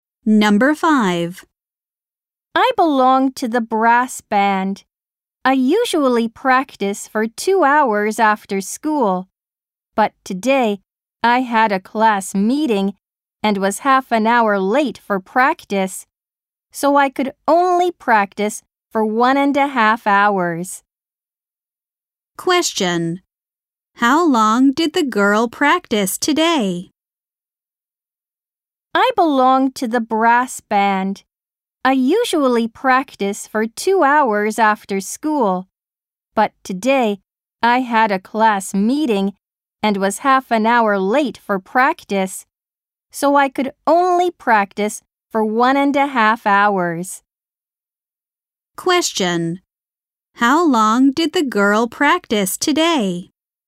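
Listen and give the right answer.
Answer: 1.5 hours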